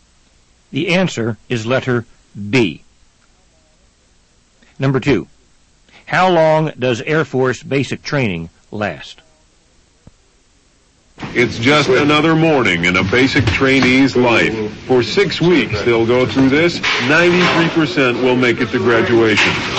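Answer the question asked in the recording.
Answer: 6 weeks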